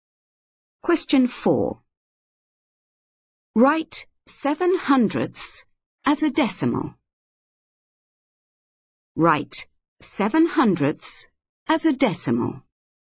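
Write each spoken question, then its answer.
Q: Write 7/100 as a decimal.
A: 0.07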